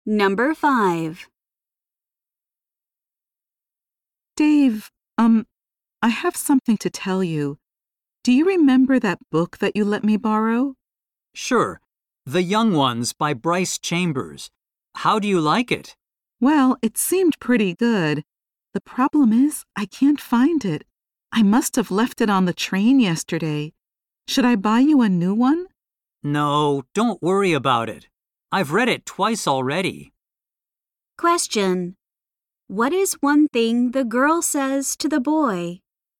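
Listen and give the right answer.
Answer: She lost his book on the train.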